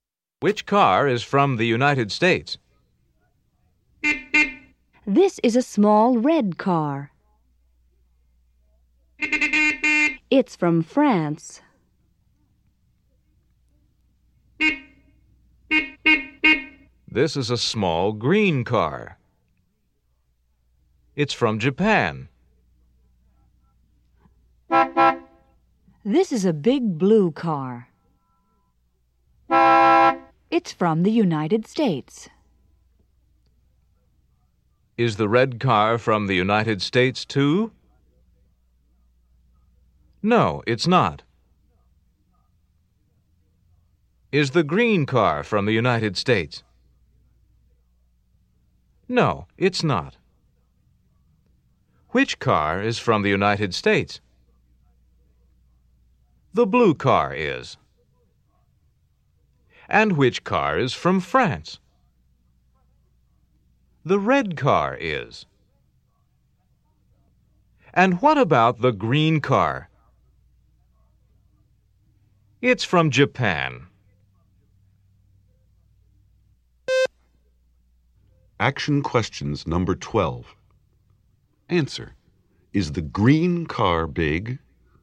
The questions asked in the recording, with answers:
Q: Is the green car big?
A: No, it's not.